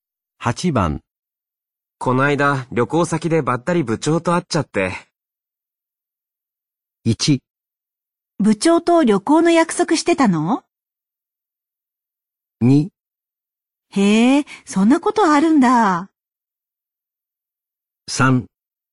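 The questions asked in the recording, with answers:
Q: こないだ旅行先でばったり部長と会っちゃって。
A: 2: へえ、そんなことあるんだ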